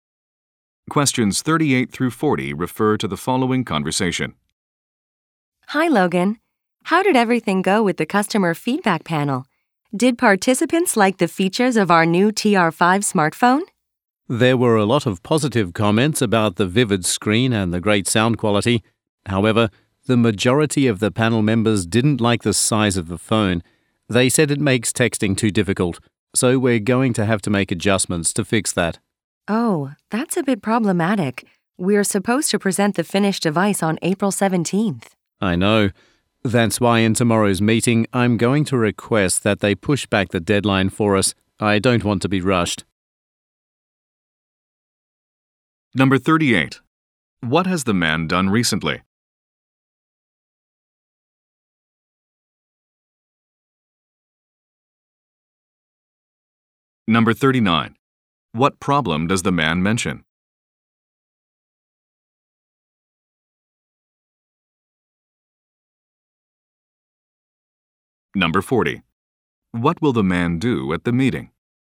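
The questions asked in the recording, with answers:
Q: What has the man done recently?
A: Run a customer feedback panel

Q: What problem does the man mention?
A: Panel members didn't like the phone's size

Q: What will the man do at the meeting?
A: Request a deadline extension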